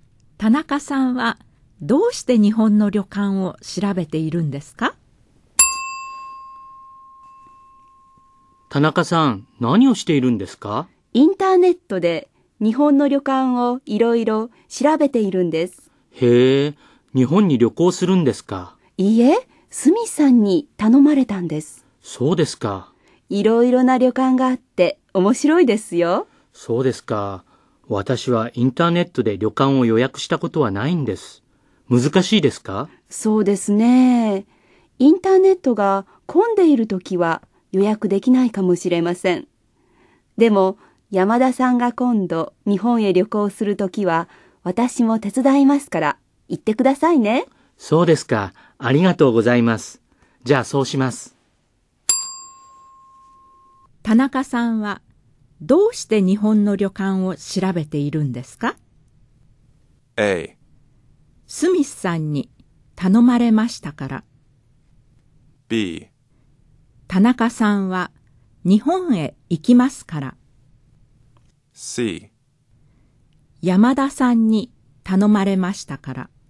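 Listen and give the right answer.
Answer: A: スミスさんに頼まれましたから。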